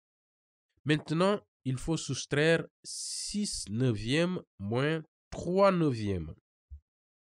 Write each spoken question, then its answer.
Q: Maintenant, il faut soustraire 6 neuvièmes moins 3 neuvièmes.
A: Mais je peux réduire 3 neuvièmes à 1 tiers.